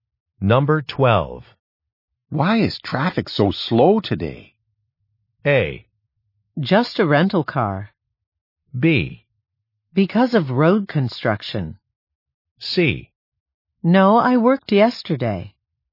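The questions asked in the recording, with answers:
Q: Why is traffic so slow today?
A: B: Because of road construction.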